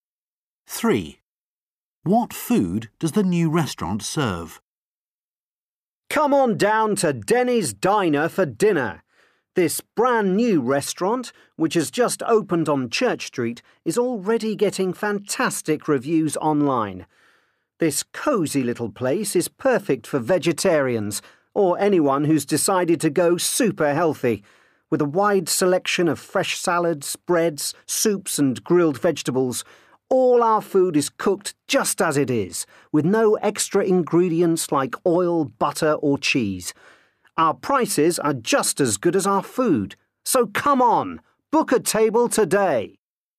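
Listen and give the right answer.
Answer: Plain vegetarian food: salads, breads, soups and grilled vegetables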